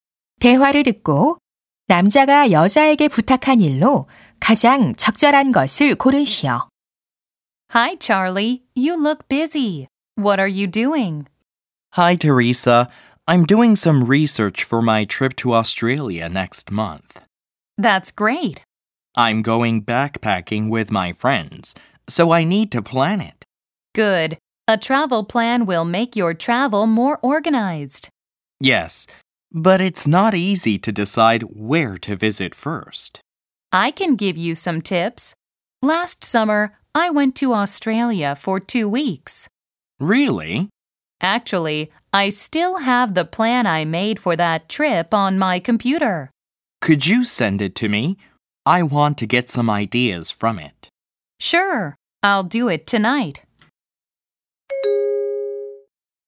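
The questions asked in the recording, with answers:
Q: 대화를 듣고 남자가 여자에게 부탁한 일로 가장 적절한 것을 고르시오.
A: 여행 계획서 보내 주기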